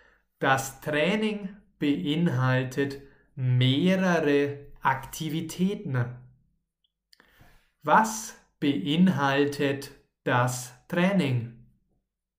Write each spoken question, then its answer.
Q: Was beinhaltet das Training?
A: Mehrere Aktivitäten. Das Training beinhaltet mehrere Aktivitäten.